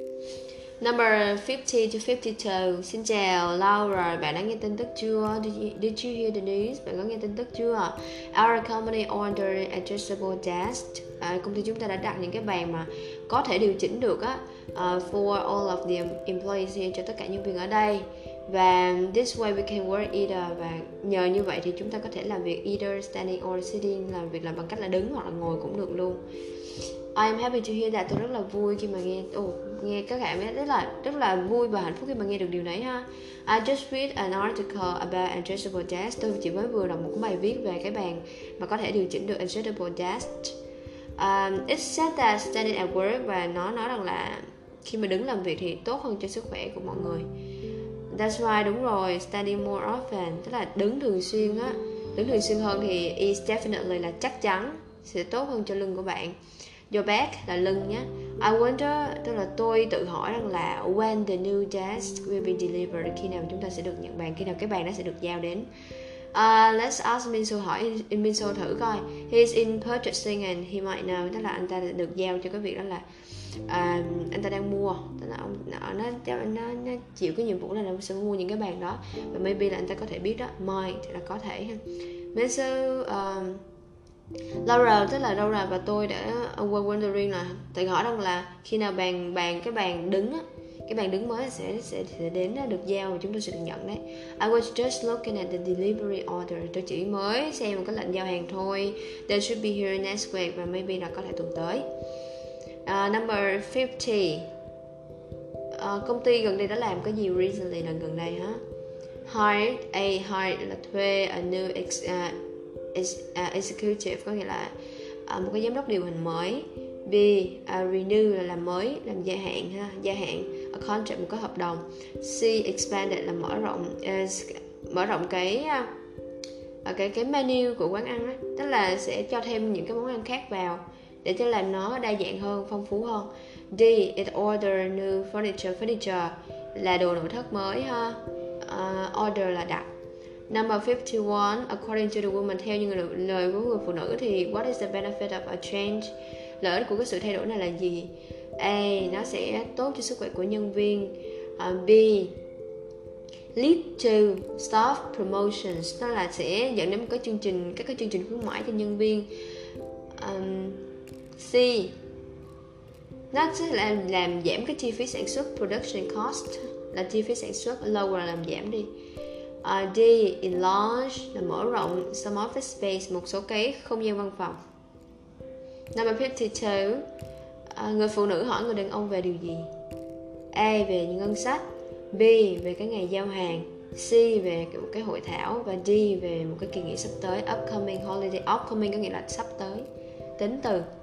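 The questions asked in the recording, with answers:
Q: Number 50, công ty gần đây đã làm cái gì recently, là gần đây hả?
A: D: đặt đồ nội thất mới

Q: Number 51, according to the woman, theo như lời của người phụ nữ thì what is the benefit of a change?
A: A: tốt cho sức khỏe của nhân viên

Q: Number 52, người phụ nữ hỏi người đàn ông về điều gì?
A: B: về cái ngày giao hàng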